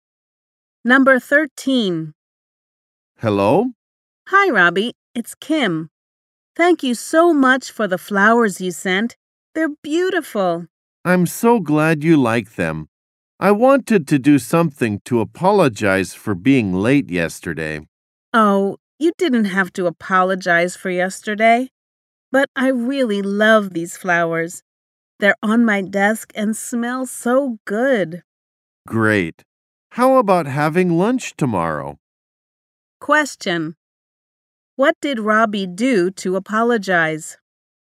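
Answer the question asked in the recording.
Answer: He sent Kim flowers.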